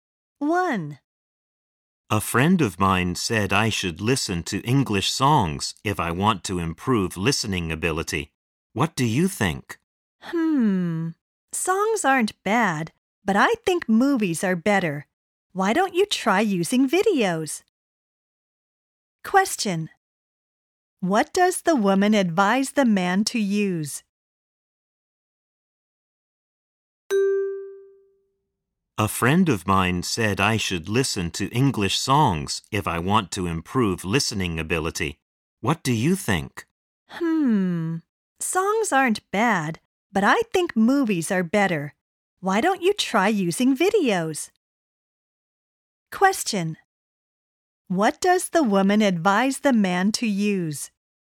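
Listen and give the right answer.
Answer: Videos (movies)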